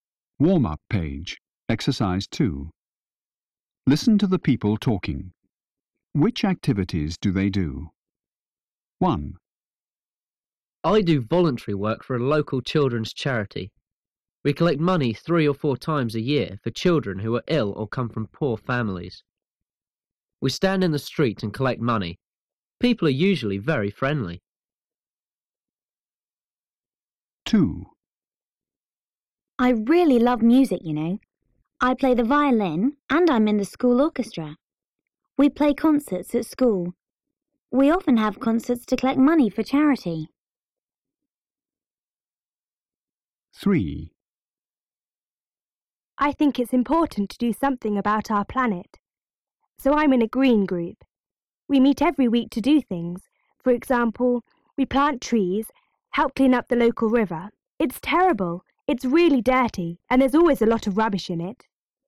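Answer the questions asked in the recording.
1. Collects money in the street for a children's charity
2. Plays the violin in the school orchestra at charity concerts
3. Is in a green group: plants trees and helps clean up the local river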